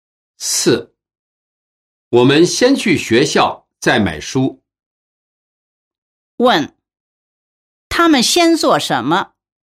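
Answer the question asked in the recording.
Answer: 去学校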